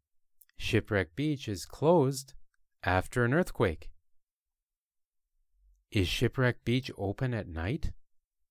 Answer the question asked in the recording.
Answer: No, Shipwreck Beach isn't open at night or during the day.